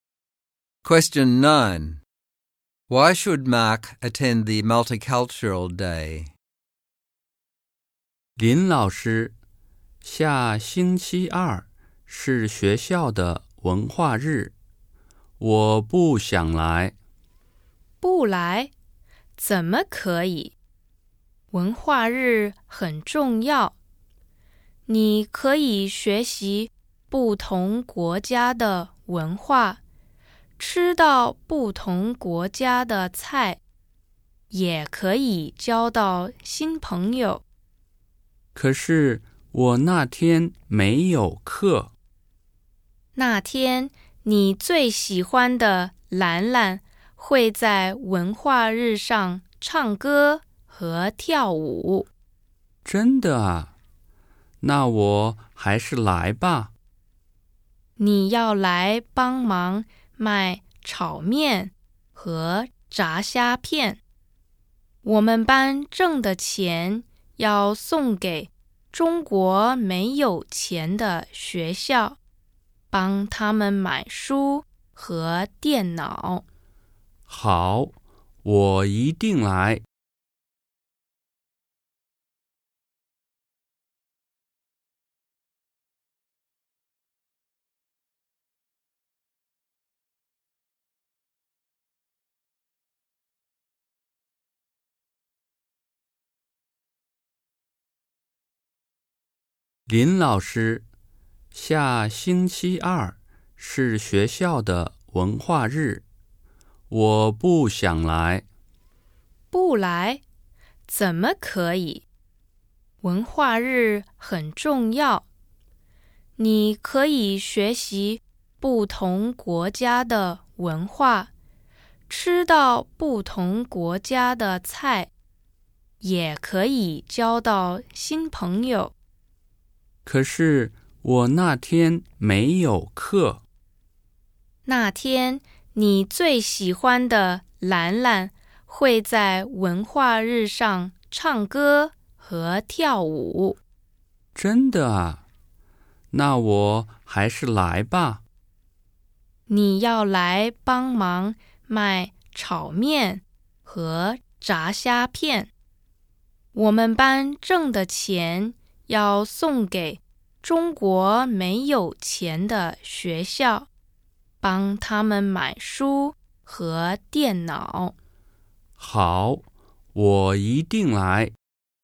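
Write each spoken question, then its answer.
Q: Why should Mark attend the Multicultural Day?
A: To learn about other cultures, eat food from other countries, make friends, see Lanlan perform, and help sell food to raise money for poor schools in China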